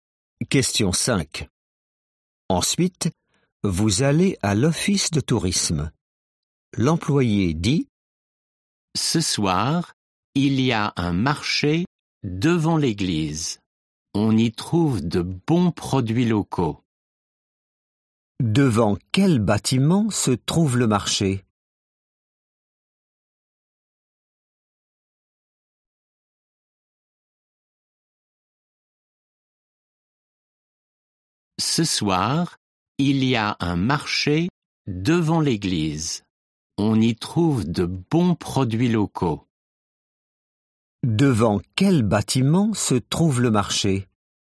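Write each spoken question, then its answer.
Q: Devant quel bâtiment se trouve le marché ?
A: l'église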